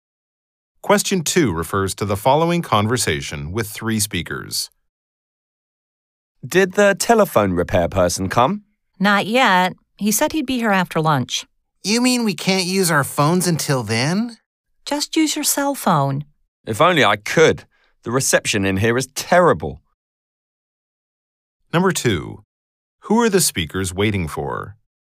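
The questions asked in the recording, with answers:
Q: Who are the speakers waiting for?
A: The telephone repair person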